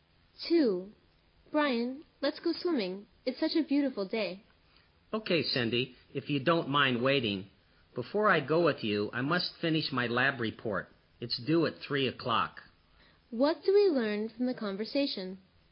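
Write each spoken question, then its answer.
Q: What do we learn from the conversation?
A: Brian will go swimming after he finishes his lab report.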